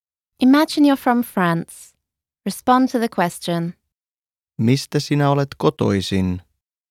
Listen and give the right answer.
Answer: Olen kotoisin Ranskasta.